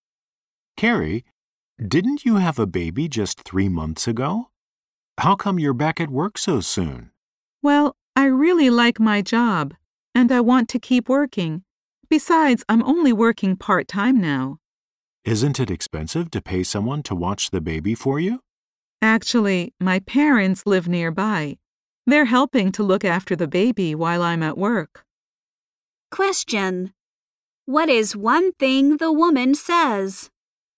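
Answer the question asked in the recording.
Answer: Her parents help look after her baby.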